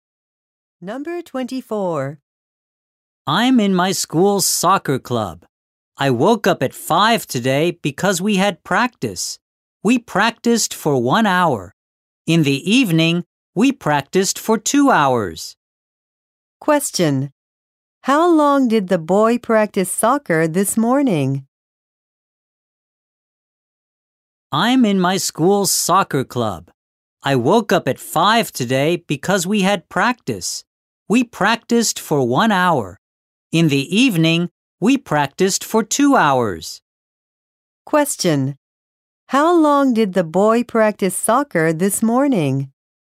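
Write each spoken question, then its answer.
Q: Question: How long did the boy practice soccer this morning?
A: For 1 hour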